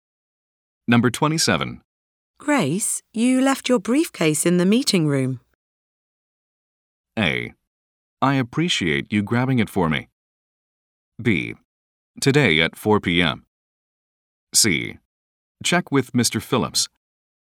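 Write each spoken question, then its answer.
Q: Grace, you left your briefcase in the meeting room.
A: A: I appreciate you grabbing it for me.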